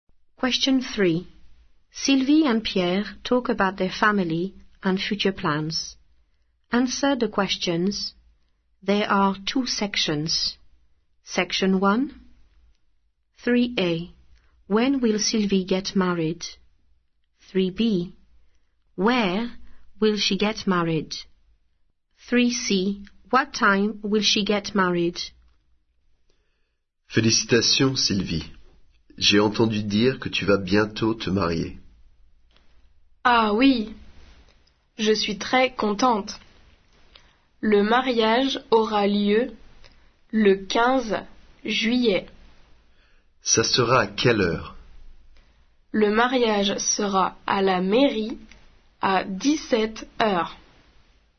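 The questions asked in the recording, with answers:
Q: When will Sylvie get married?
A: 15th July

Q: Where will she get married?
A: At the town hall

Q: What time will she get married?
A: 5 pm (17:00)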